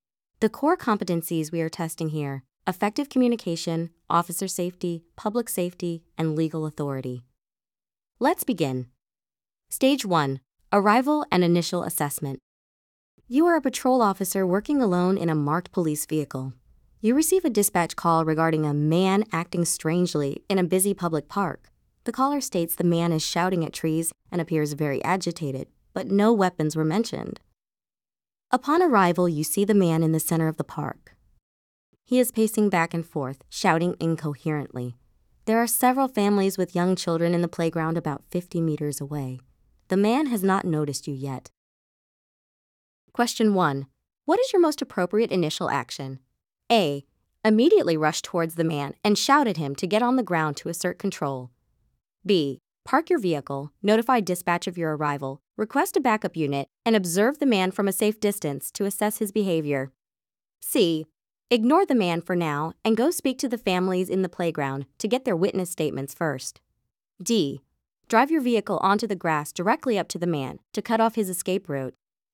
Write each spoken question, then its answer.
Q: What is your most appropriate initial action?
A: The correct answer is B.